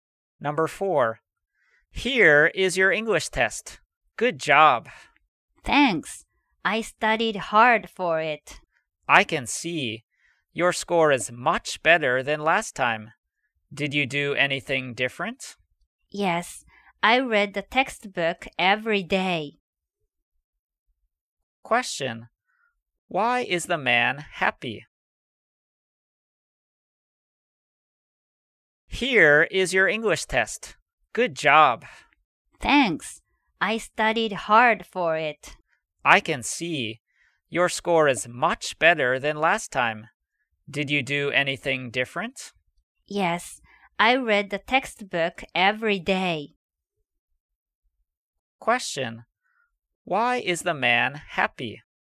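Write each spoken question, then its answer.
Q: Why is the man happy?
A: His English test score was much better than last time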